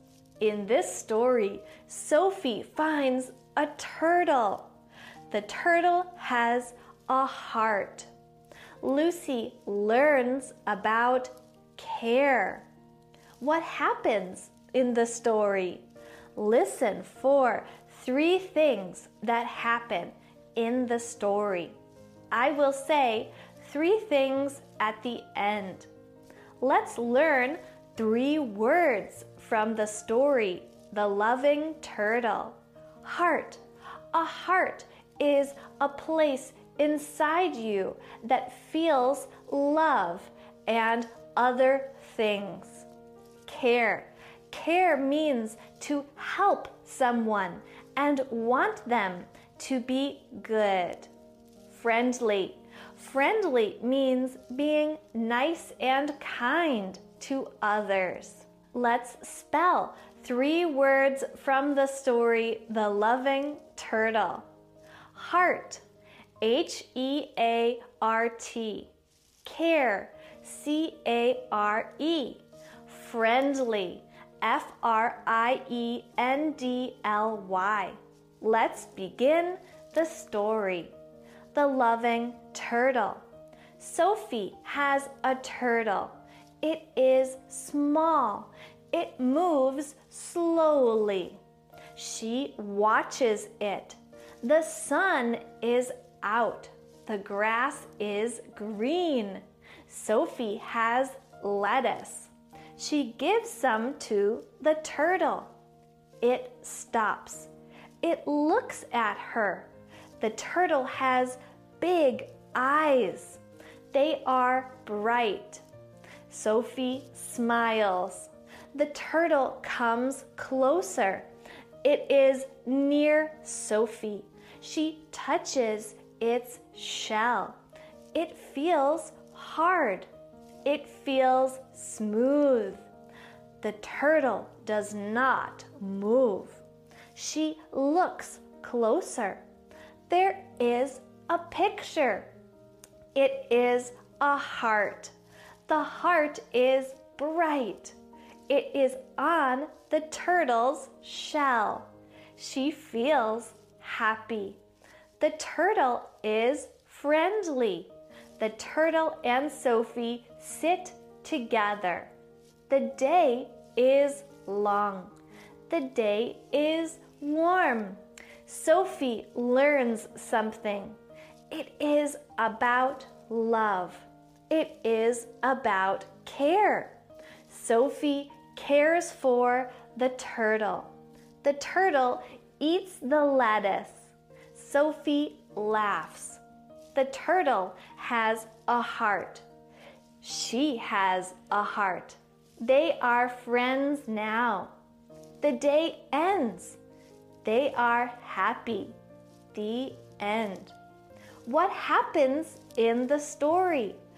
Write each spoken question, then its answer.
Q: What happens in the story?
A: 1. Sophie cares for the turtle. She gives the turtle lettuce. 2. The turtle comes close to Sophie. 3. Sophie sees the turtle has a heart.